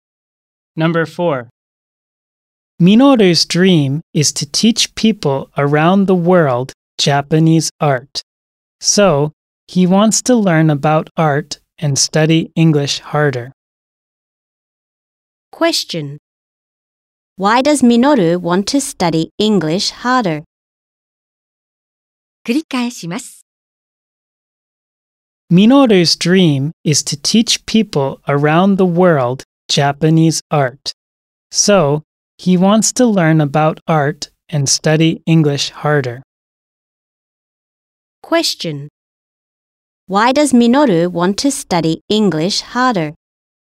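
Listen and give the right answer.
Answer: Because he wants to teach people around the world Japanese art.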